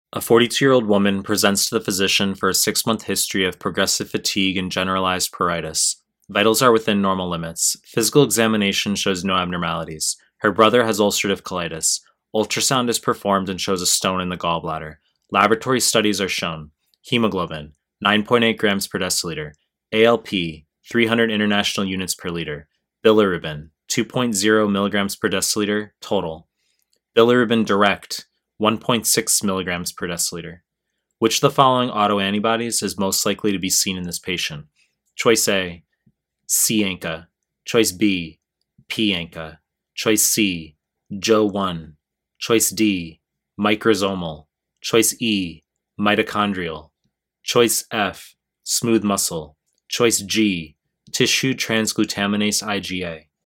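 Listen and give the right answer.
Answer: E: mitochondrial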